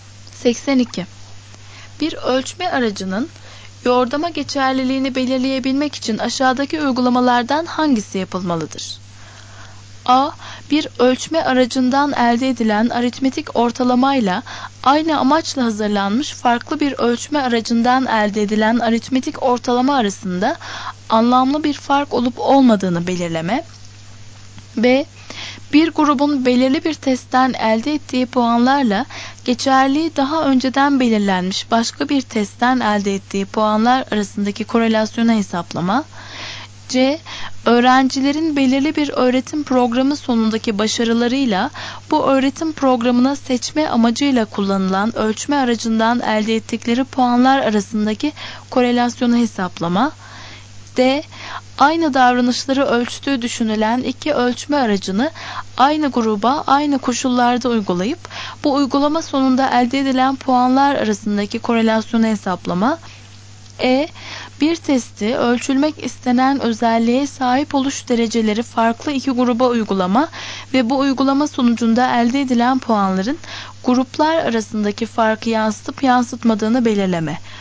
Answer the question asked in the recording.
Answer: Doğru cevap C.